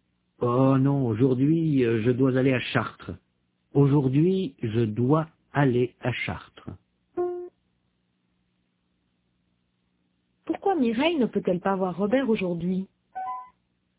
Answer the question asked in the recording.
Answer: Parce qu'elle doit aller à Chartres.